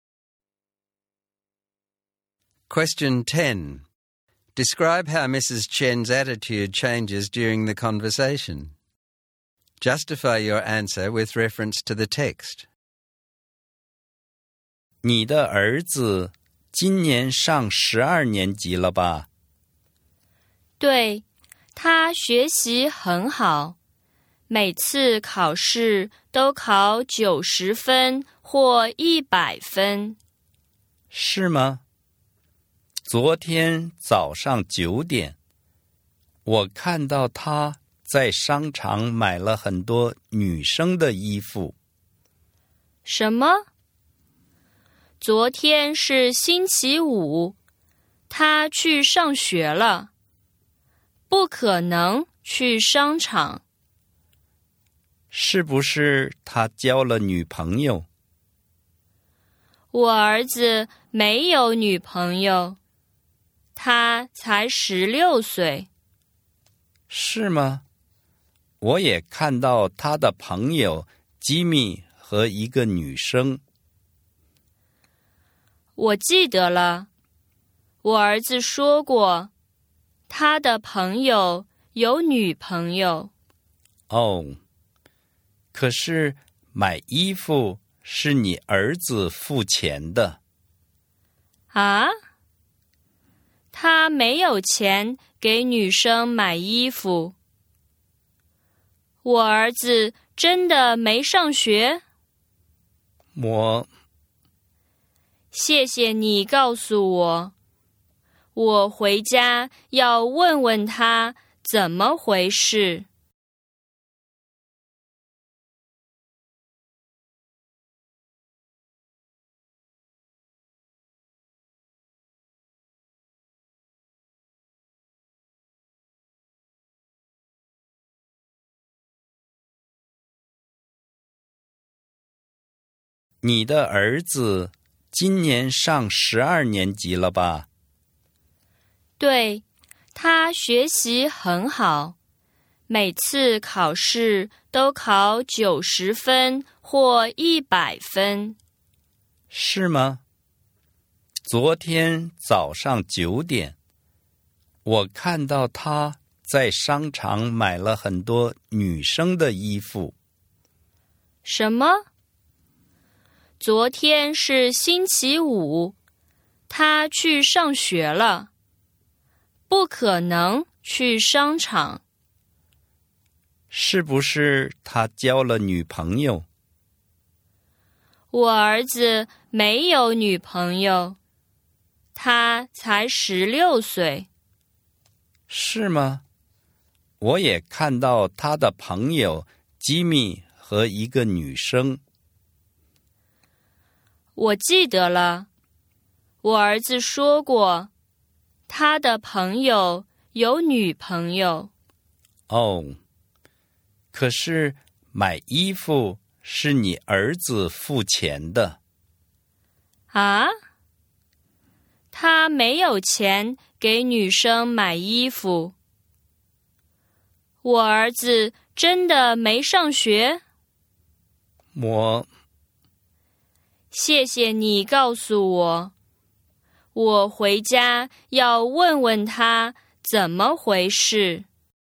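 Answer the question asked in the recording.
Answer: She starts out proud and confident about her son's good grades, becomes defensive and denies he went to the mall, and ends up worried and doubtful, saying she will ask him at home.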